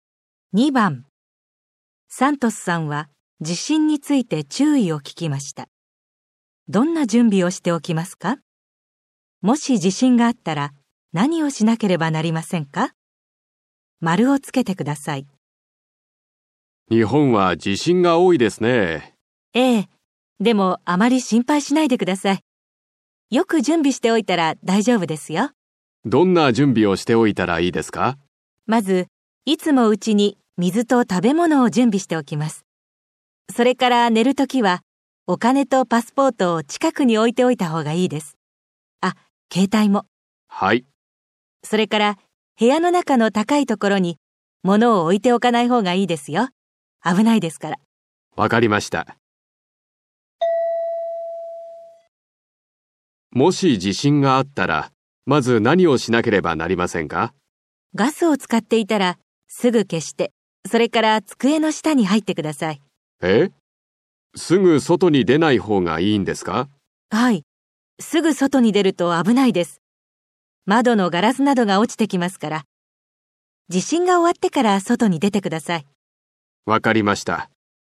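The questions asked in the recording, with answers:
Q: どんな準備をしておきますか?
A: うちに水と食べ物を準備しておく。寝るときはお金とパスポート(と携帯)を近くに置く。部屋の高いところに物を置かない。

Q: もし地震があったら何をしなければなりませんか?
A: ガスを使っていたらすぐ消して、机の下に入る(すぐ外に出ない)。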